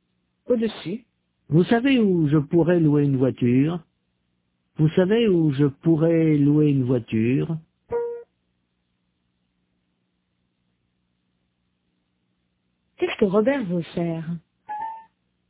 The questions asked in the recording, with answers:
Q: Qu'est-ce que Robert veut faire?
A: Louer une voiture.